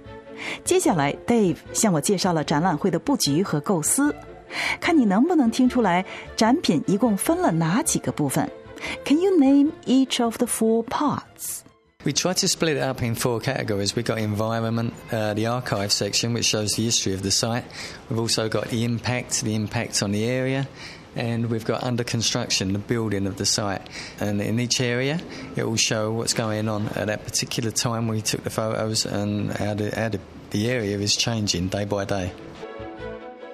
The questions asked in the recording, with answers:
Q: Can you name each of the four parts?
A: They are environment, 环境, the archive, 历史照片,The impact, 奥运建设对当地的影响。